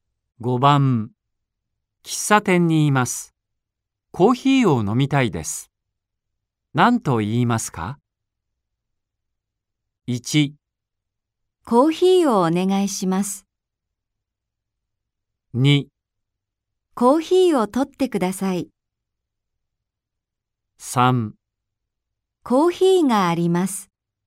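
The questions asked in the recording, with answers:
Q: 喫茶店にいます。コーヒーを飲みたいです。何と言いますか ?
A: 1: コーヒーをお願いします。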